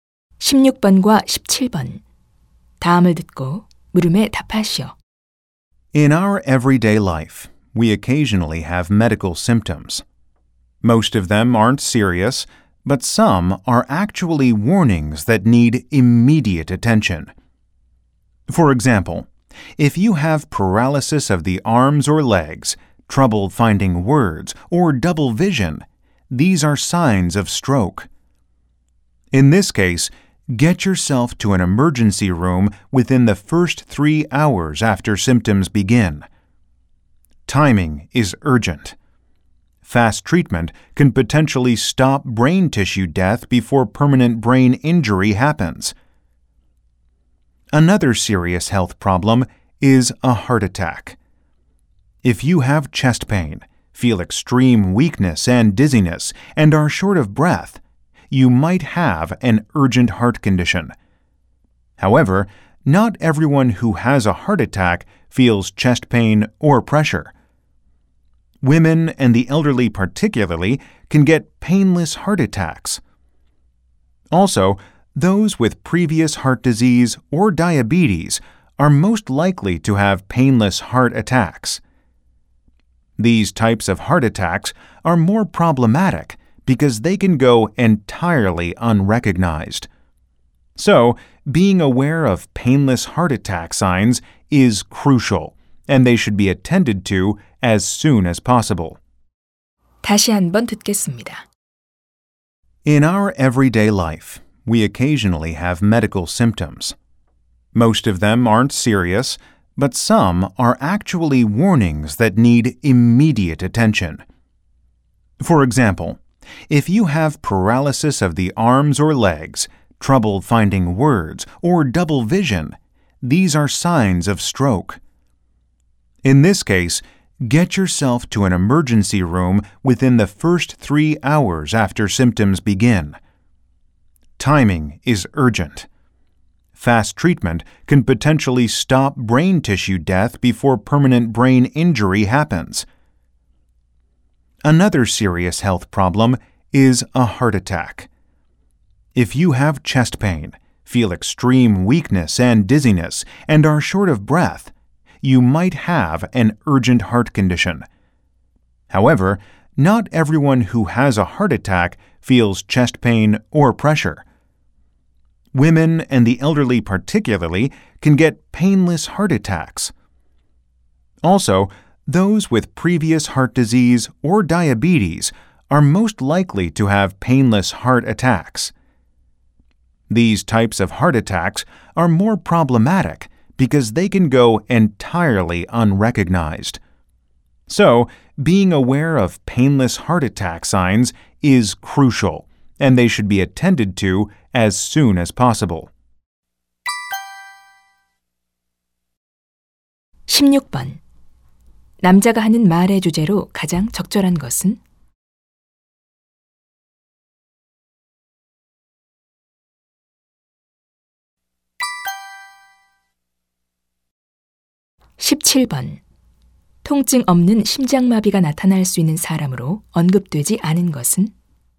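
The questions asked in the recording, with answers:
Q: 남자가 하는 말의 주제로 가장 적절한 것은?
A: 즉각적인 치료가 필요한 위험한 증상들(뇌졸중, 심장마비)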